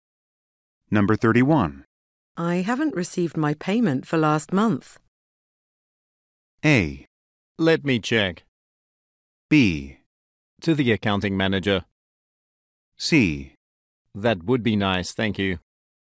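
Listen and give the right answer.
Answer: A: Let me check.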